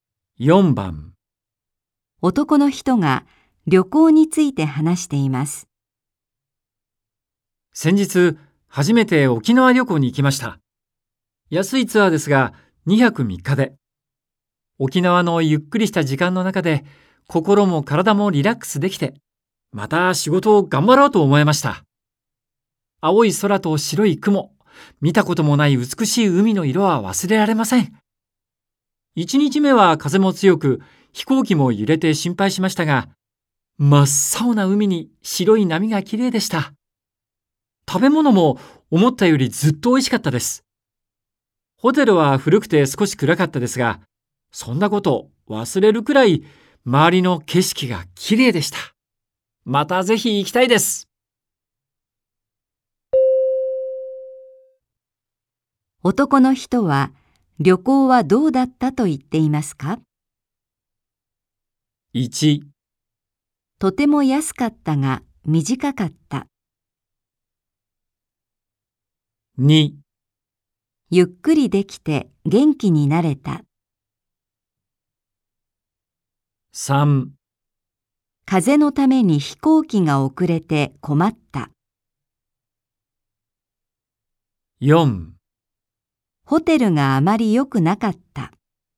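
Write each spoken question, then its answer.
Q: 男の人は旅行はどうだったと言っていますか?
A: 2: ゆっくりできて元気になれた。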